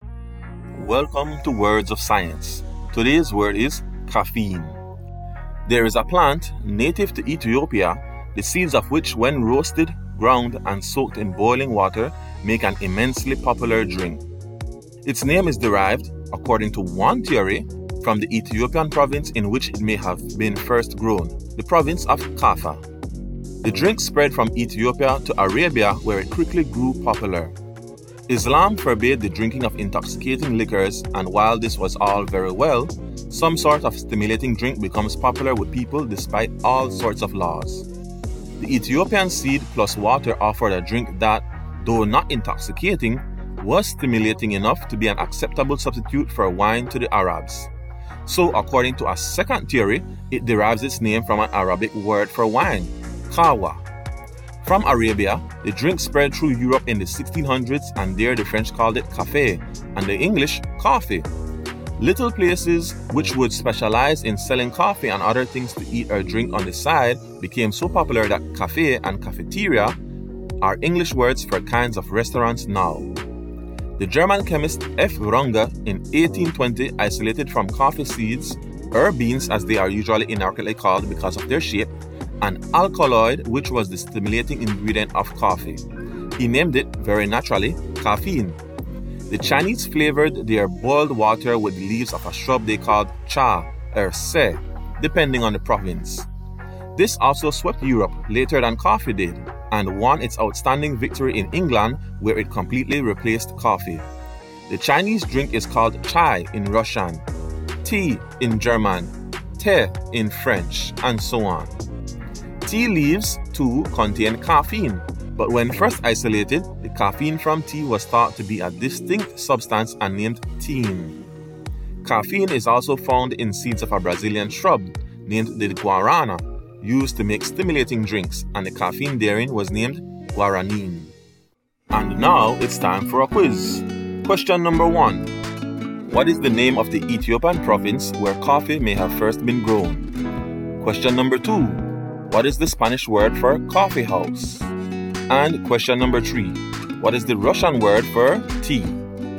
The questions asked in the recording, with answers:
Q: What is the name of the Ethiopian province where coffee may have first been grown?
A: kafa

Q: what is the Russian word for tea?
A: chai